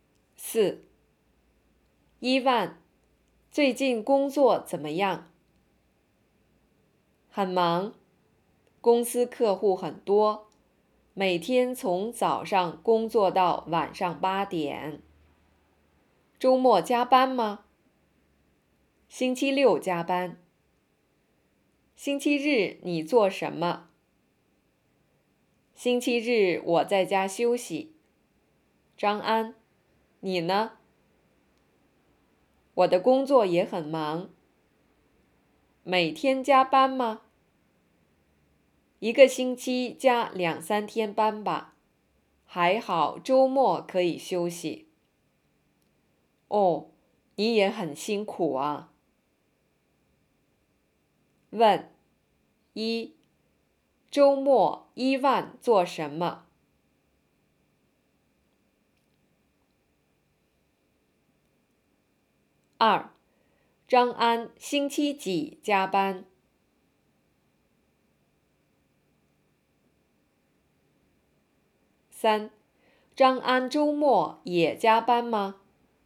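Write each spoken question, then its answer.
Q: 周末伊万做什么?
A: 星期六加班,星期日在家休息

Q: 张安周末也加班吗?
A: 不加班,周末可以休息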